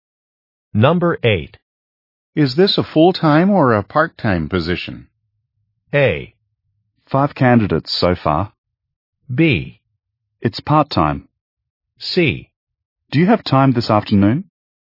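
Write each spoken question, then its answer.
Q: Is this a full-time or a part-time position?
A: B: It's part-time.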